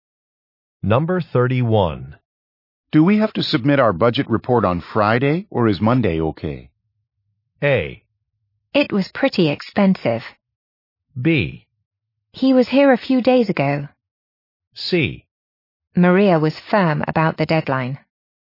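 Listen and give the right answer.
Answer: C: Maria was firm about the deadline.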